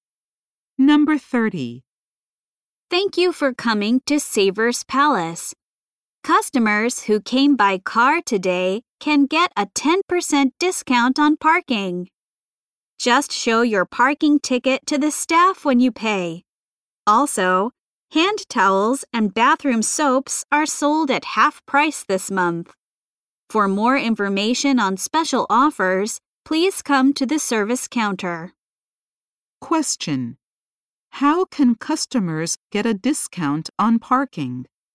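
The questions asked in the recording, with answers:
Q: How can customers get a discount on parking?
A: By showing their parking ticket to the staff when they pay.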